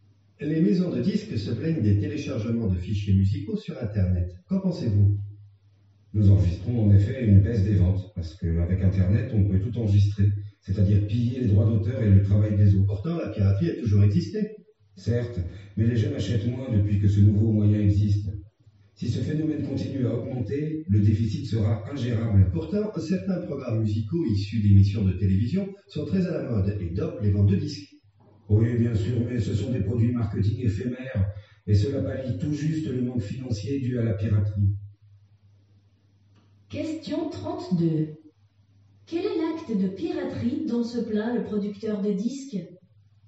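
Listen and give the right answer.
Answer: Le téléchargement de fichiers musicaux sur Internet (qui pille les droits d'auteur)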